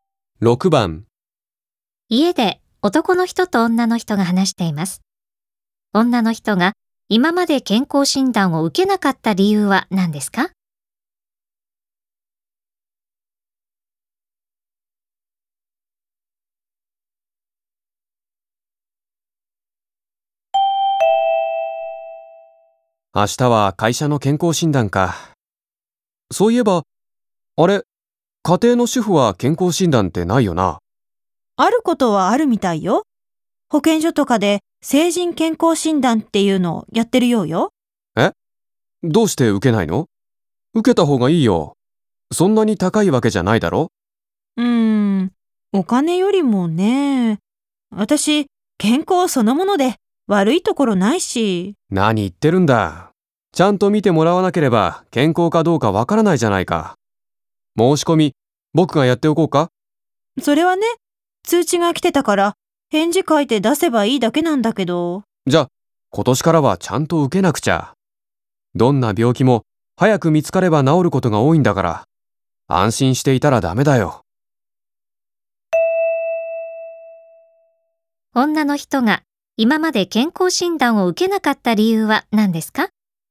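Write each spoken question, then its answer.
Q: 女の人が今まで健康診断を受けなかった理由は何ですか?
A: 自分は健康で悪いところがないと思っていたから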